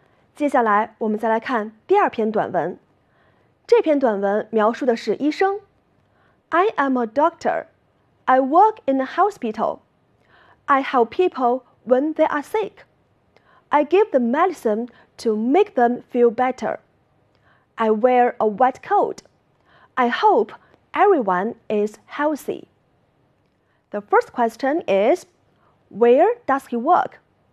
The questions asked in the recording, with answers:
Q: where does he work?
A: He works in a hospital.